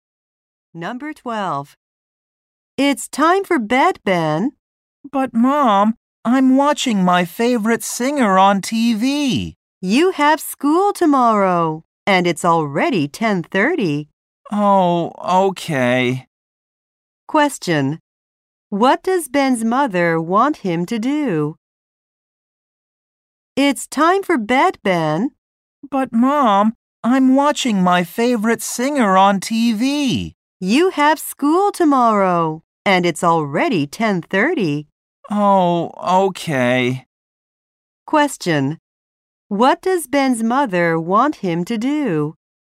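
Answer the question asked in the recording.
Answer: Go to bed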